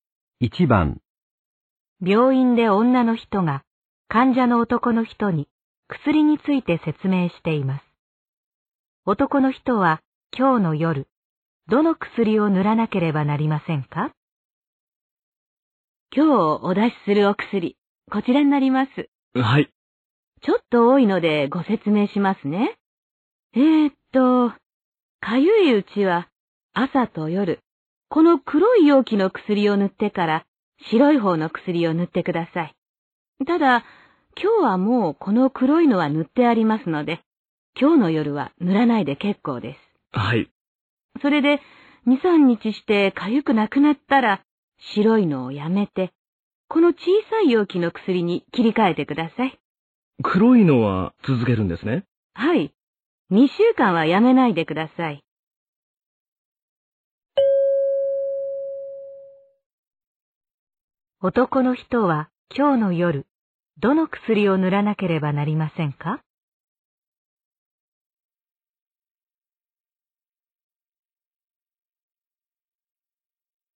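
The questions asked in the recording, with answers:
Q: 男の人は今日の夜、どの薬を塗らなければなりませんか?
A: 白い方の薬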